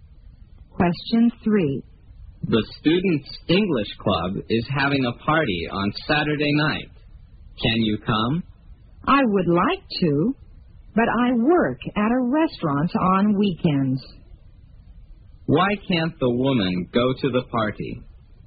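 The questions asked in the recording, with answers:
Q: Why can't the woman go to the party?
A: She works at a restaurant on weekends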